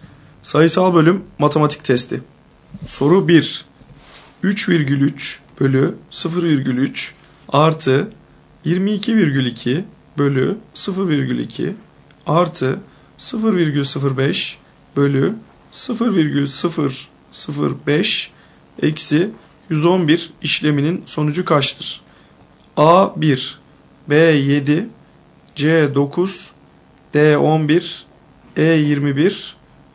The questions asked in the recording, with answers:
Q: 3,3 bölü 0,3 artı 22,2 bölü 0,2 artı 0,05 bölü 0,005 eksi 111 işleminin sonucu kaçtır?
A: Doğru cevap E 21.